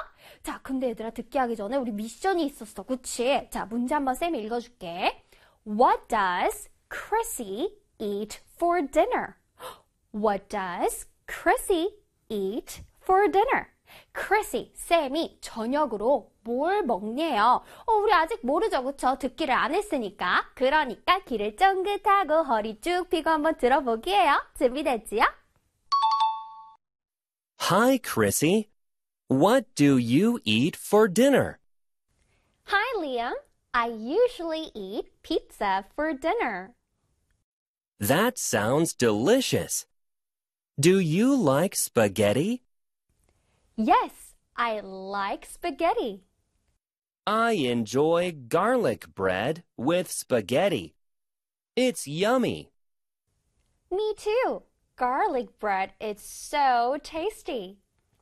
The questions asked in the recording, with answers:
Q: What does Chrissy eat for dinner?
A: Hi, Liam. I usually eat pizza for dinner.